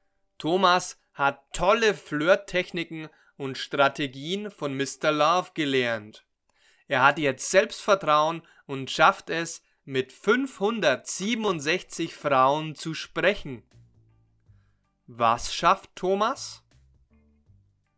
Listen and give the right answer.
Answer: Er schafft es, mit 567 Frauen zu sprechen.